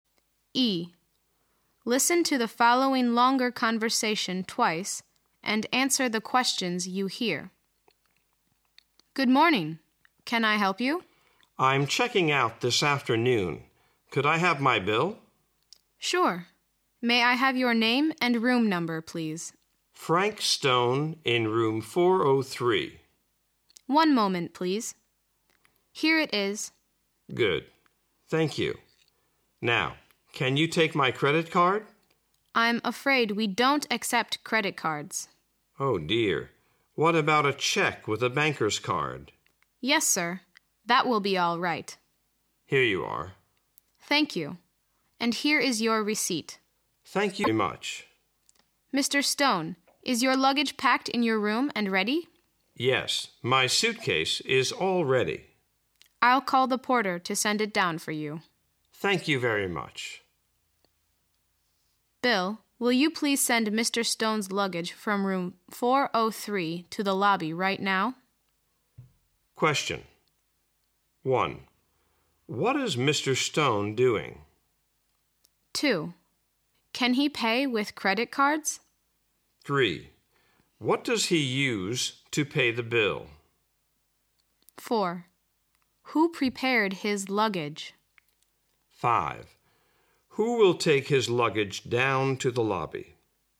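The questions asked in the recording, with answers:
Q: What is Mr. Stone doing?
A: Checking out of the hotel and paying his bill

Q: Can he pay with credit cards?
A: No, he can't

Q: What does he use to pay the bill?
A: A check with a banker's card

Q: Who will take his luggage down to the lobby?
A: The porter (Bill)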